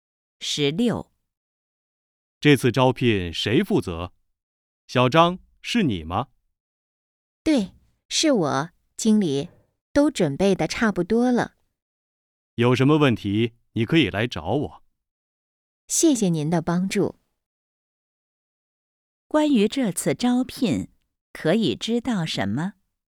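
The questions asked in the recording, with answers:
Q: 关于这次招聘,可以知道什么?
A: 由小张负责,已经准备得差不多了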